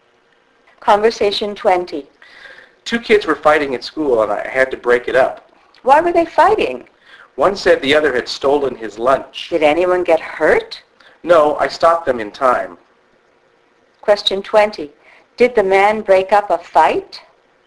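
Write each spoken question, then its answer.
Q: Did the man break up a fight?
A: Yes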